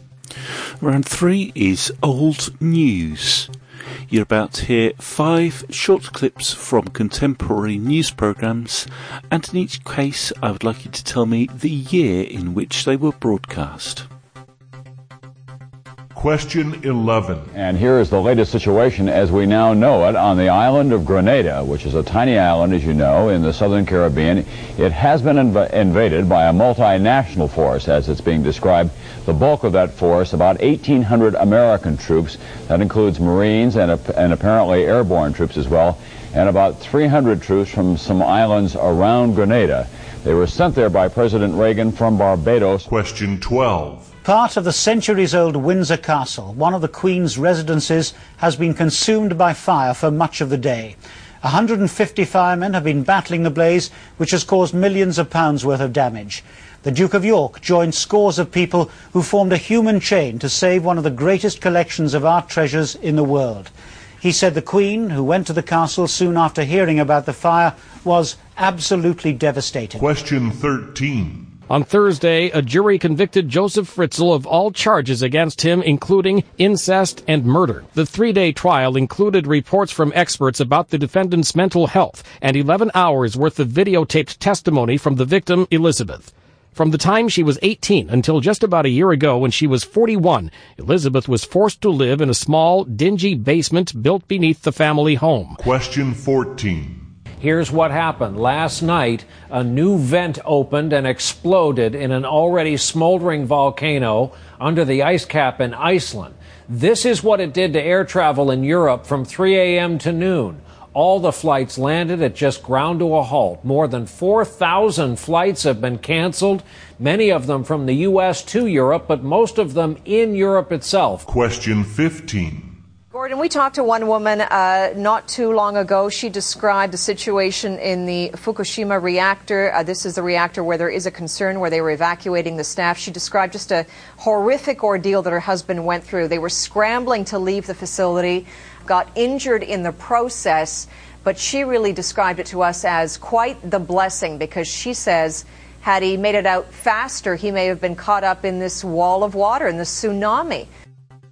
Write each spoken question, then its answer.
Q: Question 11.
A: 1983.

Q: Question 12.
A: 1992.

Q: Question 14.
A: the Icelandic volcano erupting was 2010.

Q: Question 15.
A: the problems at the Fukushima nuclear power plant was 2011.